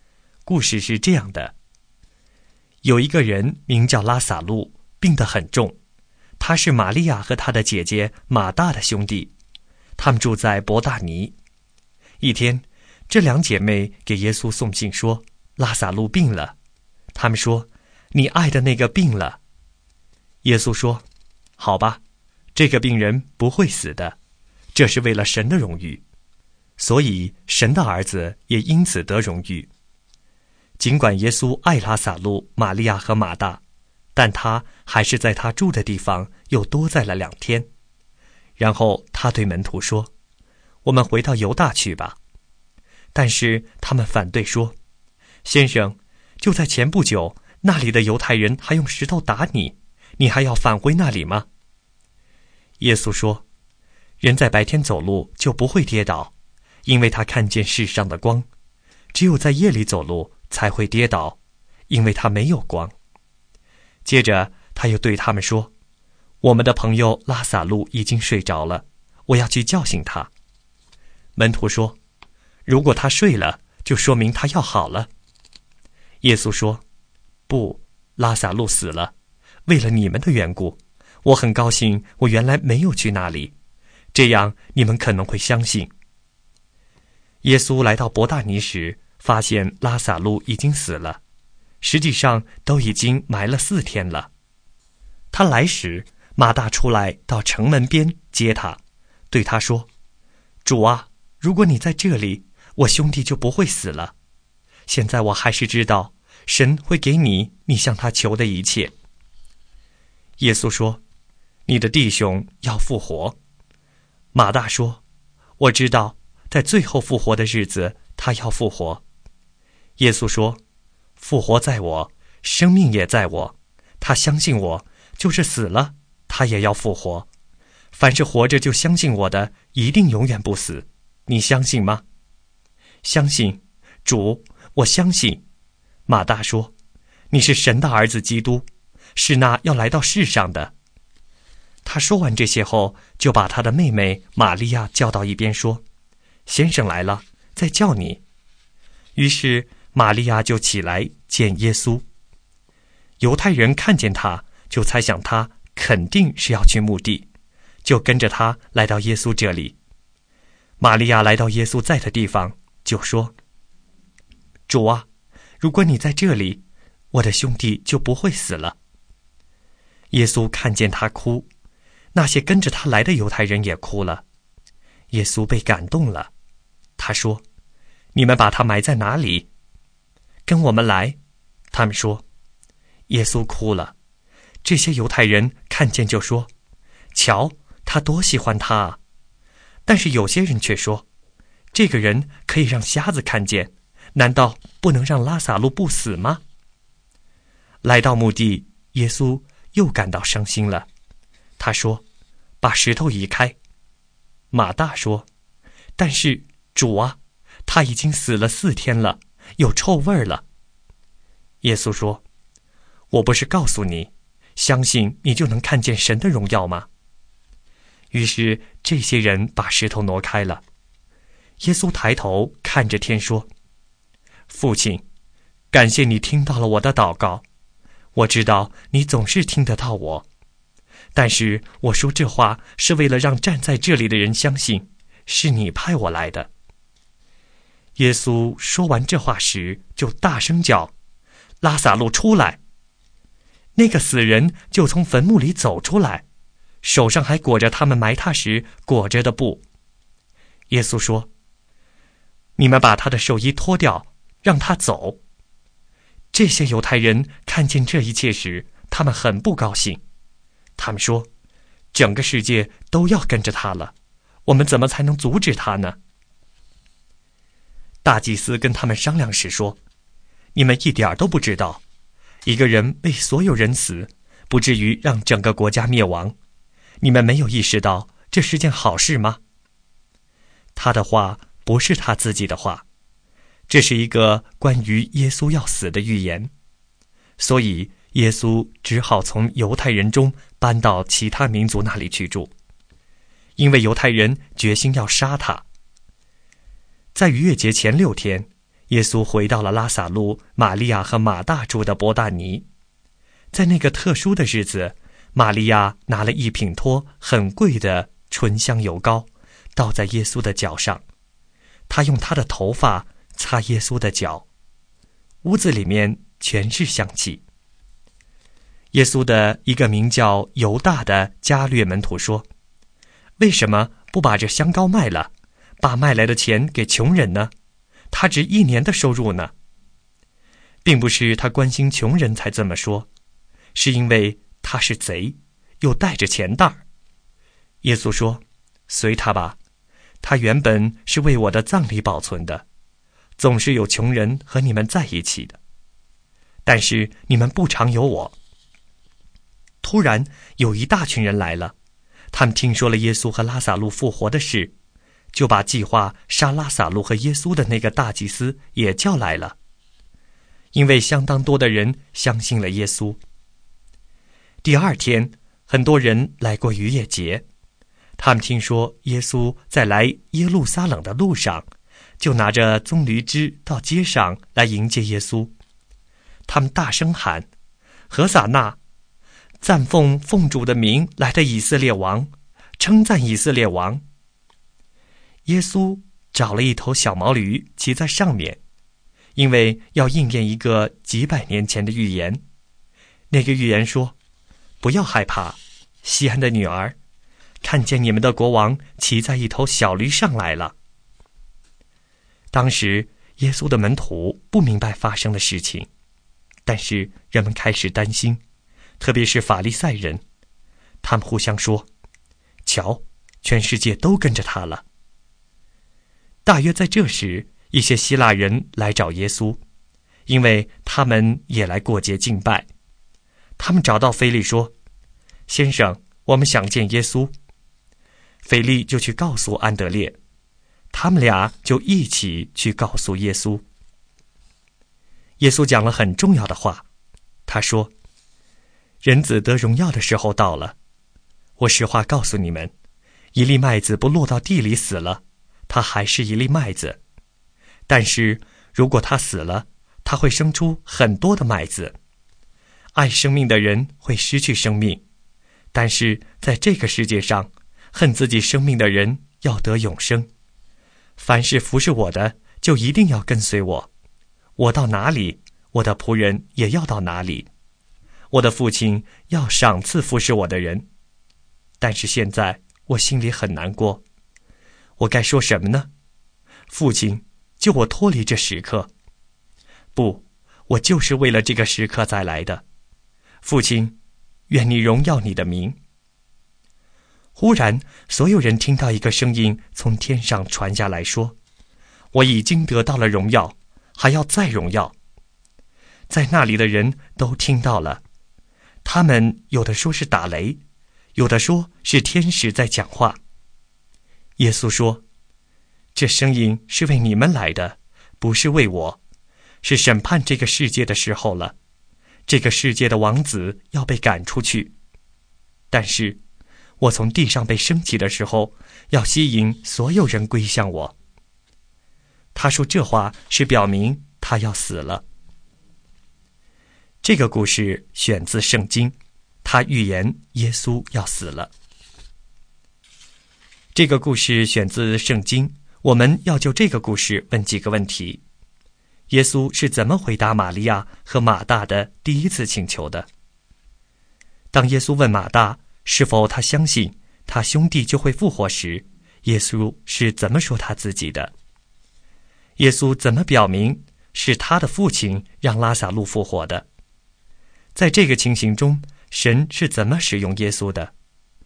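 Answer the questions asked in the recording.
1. 他说这个病人不会死,这是为了神的荣誉,神的儿子也因此得荣誉;然后他在原地又多待了两天。
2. 复活在我,生命也在我。
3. 他抬头看天祷告,感谢父亲听了他的祷告,好让站在那里的人相信是父亲派他来的。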